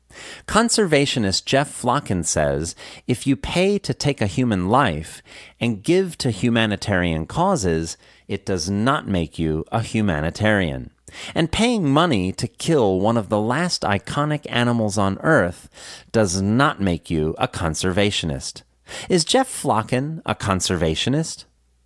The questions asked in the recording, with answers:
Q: Is Jeff Flocken a conservationist?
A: Yes, Jeff Flocken is a conservationist.